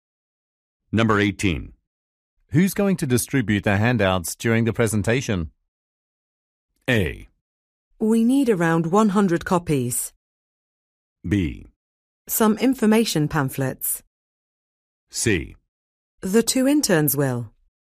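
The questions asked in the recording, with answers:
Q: Who's going to distribute the handouts during the presentation?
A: C: The 2 interns will.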